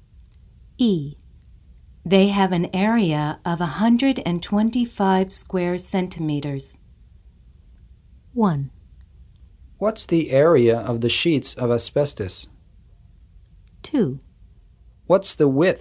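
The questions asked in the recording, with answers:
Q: They have an area of 125 square centimeters.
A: 1: What's the area of the sheets of asbestos?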